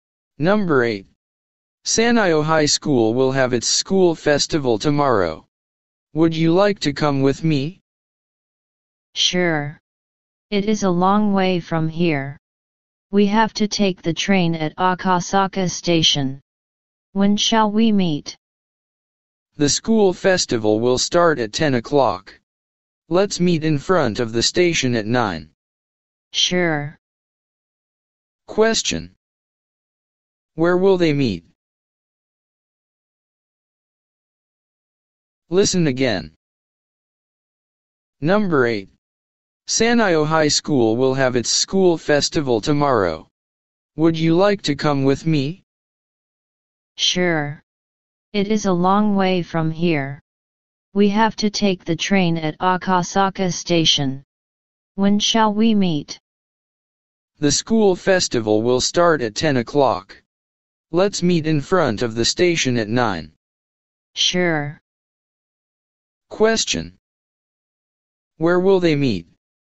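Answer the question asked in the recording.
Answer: In front of Akasaka Station.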